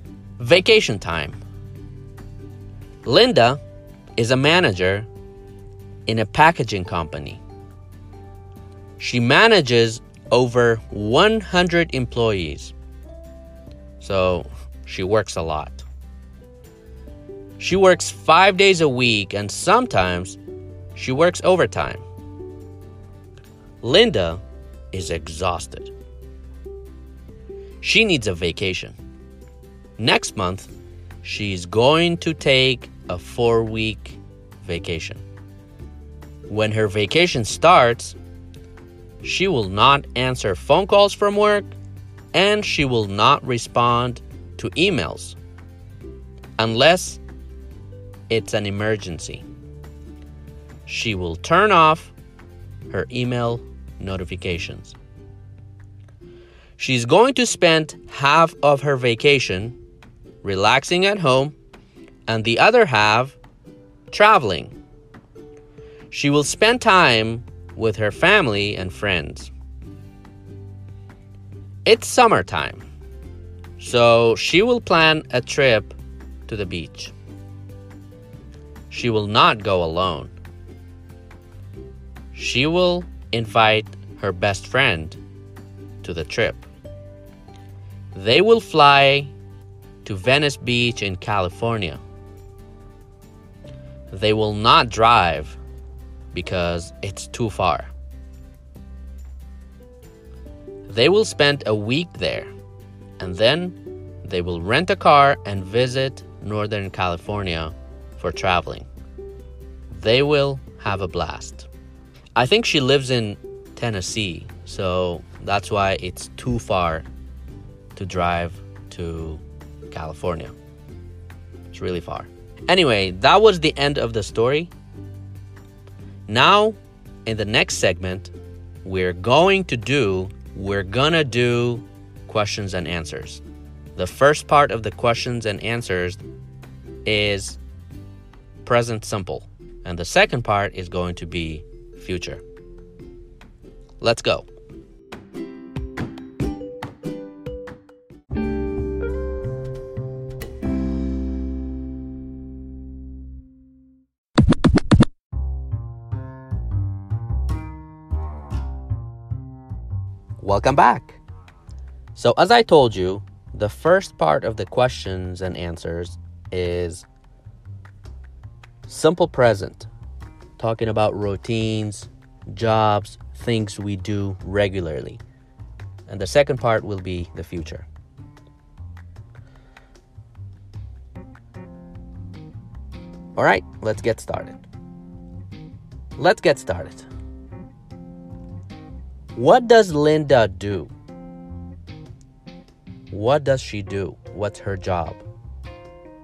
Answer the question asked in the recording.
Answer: She's a manager in a packaging company.